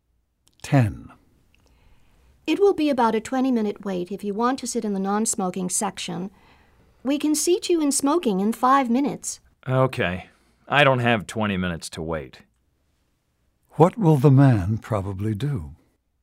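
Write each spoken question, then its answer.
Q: What will the man probably do?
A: Sit in the smoking section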